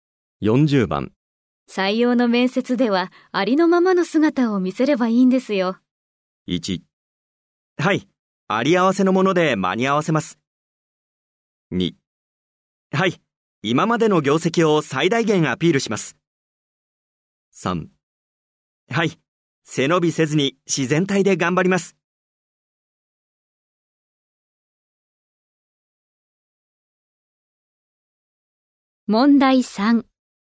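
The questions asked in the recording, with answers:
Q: 採用の面接ではありのままの姿を見せればいいんですよ。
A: 3: はい、背伸びせずに自然体で頑張ります。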